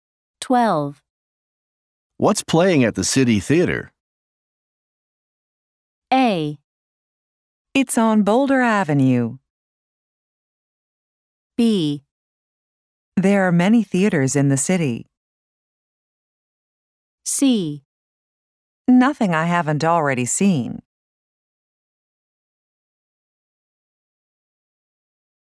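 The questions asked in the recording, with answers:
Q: What's playing at the City Theater?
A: C: Nothing I haven't already seen.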